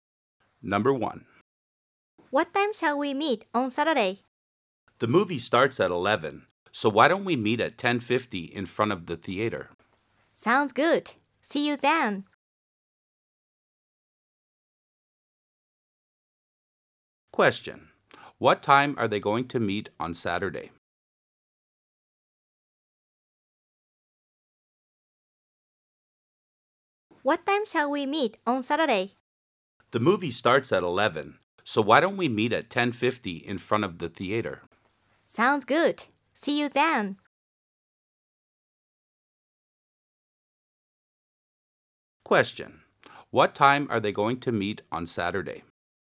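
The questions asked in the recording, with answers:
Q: What time are they going to meet on Saturday?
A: At 10:50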